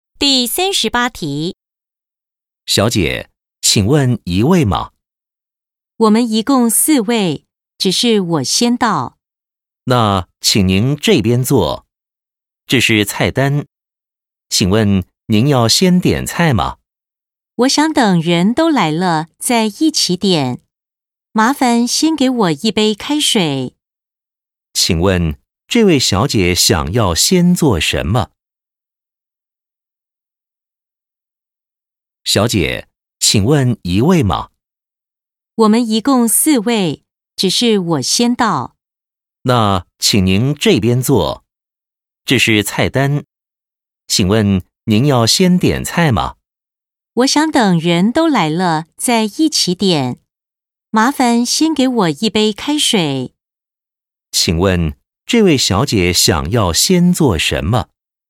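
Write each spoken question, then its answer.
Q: 请问这位小姐想要先做什么?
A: 先喝一杯开水(等人到齐再点菜)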